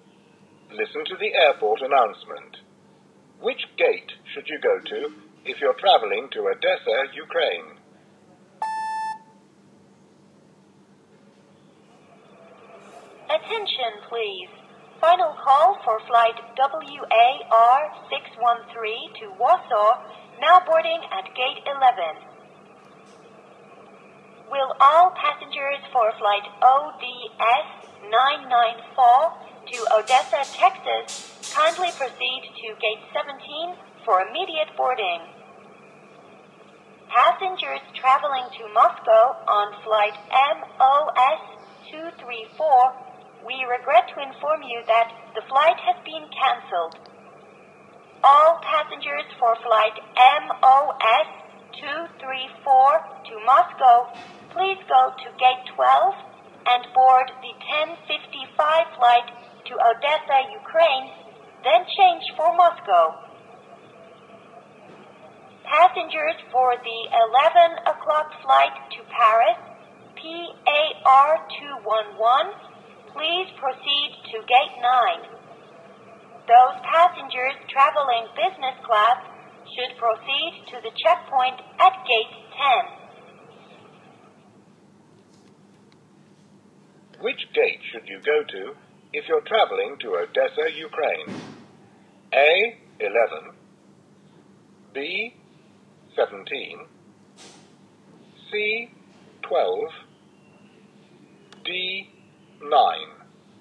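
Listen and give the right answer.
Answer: C: 12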